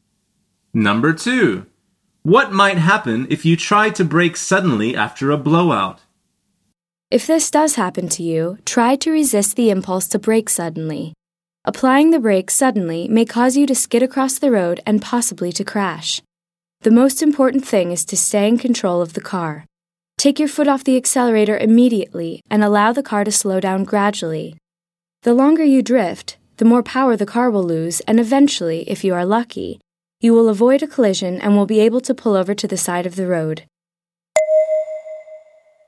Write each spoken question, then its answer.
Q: What might happen if you try to brake suddenly after a blowout?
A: The answer is you could skid across the road.